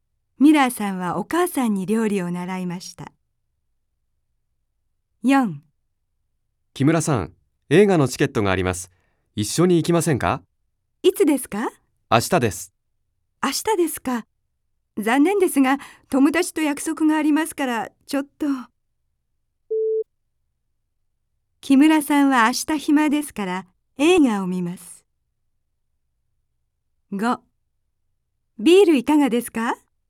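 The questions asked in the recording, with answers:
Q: 木村さんは明日暇ですから、映画を見ます。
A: ×(友達と約束があります)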